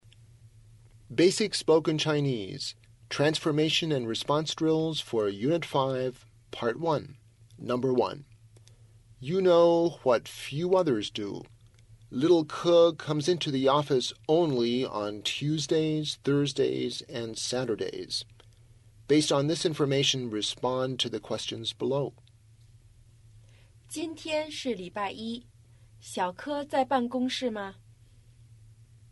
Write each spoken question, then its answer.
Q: 今天是礼拜一,小柯在办公室吗?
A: 他今天不在。